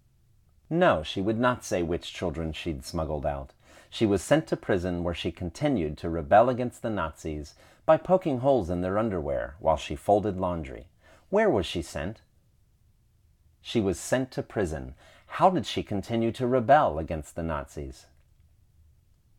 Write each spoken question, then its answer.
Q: How did she continue to rebel against the Nazis?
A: She continued to rebel against the Nazis by poking holes in their underwear while she folded laundry.